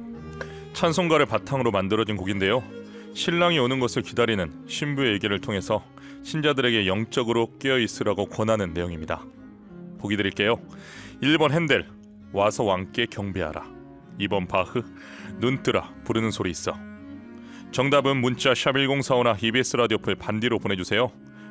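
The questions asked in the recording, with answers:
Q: 보기 드릴게요. 1번 핸델, 와서 왕께 경배하라. 2번 바흐, 눈뜨라 부르는 소리 있어.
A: 2: 바흐, 눈뜨라 부르는 소리 있어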